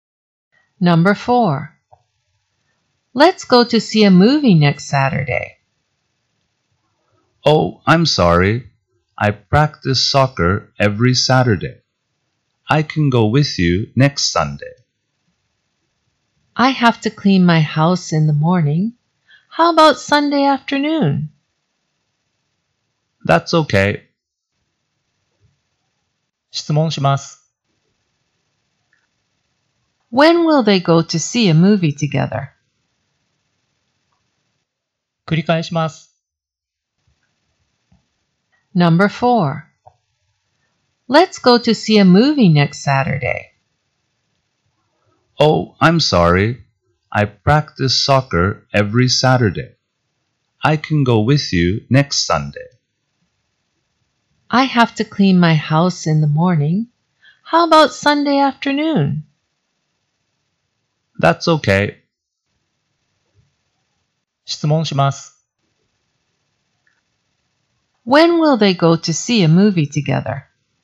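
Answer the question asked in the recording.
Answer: Next Sunday afternoon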